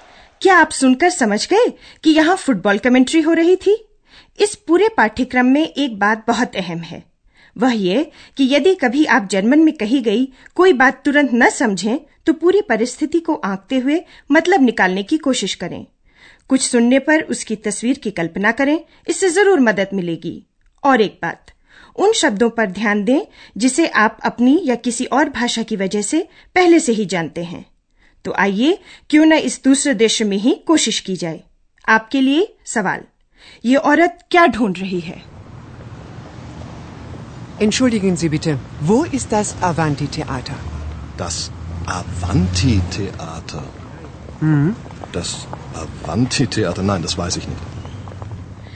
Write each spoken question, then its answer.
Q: ये औरत क्या ढूंढ रही है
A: वह अवंती theatre ढूंढ रही है